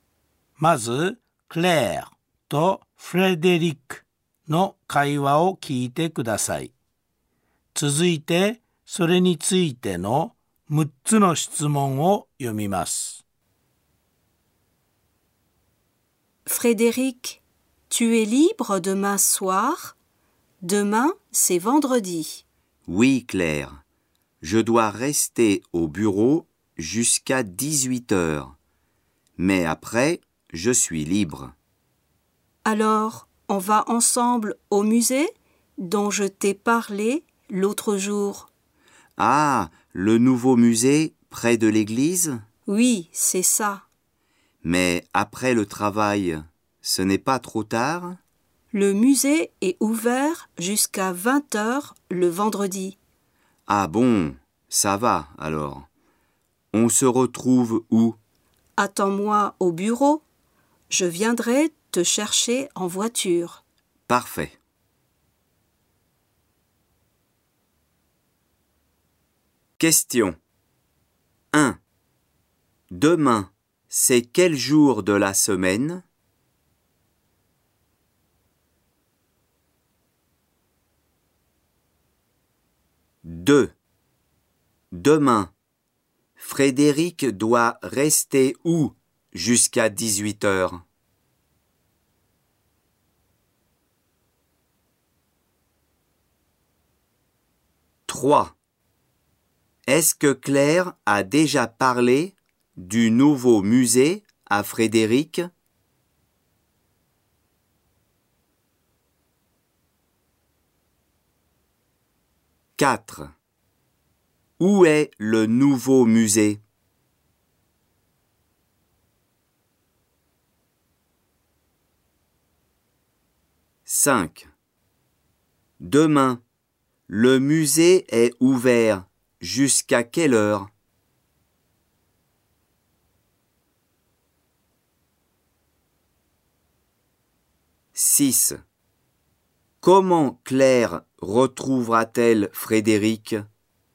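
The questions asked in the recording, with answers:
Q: Demain, c'est quel jour de la semaine ?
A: Vendredi

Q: Demain, Frédéric doit rester où jusqu'à 18h?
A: Au bureau

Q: Est-ce que Claire a déjà parlé du nouveau musée à Frédéric?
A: Oui

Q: Où est le nouveau musée?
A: Près de l'église

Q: Demain, le musée est ouvert jusqu'à quelle heure?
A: Jusqu'à 20 heures

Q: Comment Claire retrouvera-t-elle Frédéric?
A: Elle viendra le chercher en voiture au bureau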